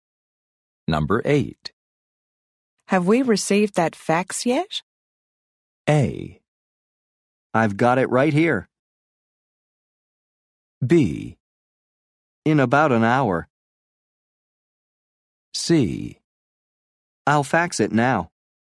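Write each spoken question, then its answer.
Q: Have we received that fax yet?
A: A: I've got it right here.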